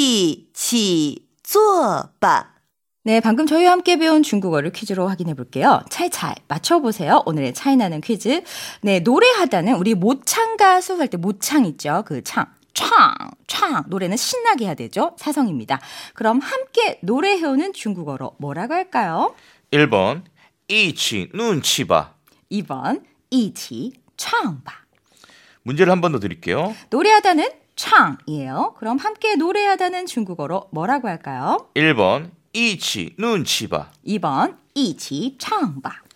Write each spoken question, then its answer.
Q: 그럼 함께 노래하다는 중국어로 뭐라고 할까요?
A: 네, 정답은요. 2번 이지창바.